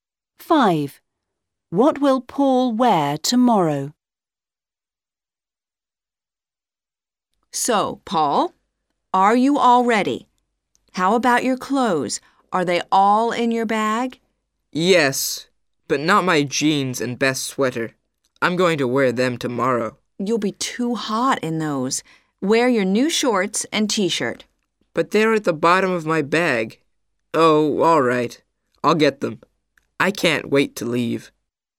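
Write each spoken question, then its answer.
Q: What will Paul wear tomorrow?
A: His new shorts and t-shirt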